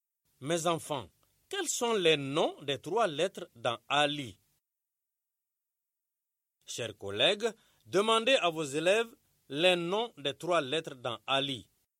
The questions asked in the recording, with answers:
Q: Mes enfants, quels sont les noms des trois lettres dans Ali?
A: A-L-I.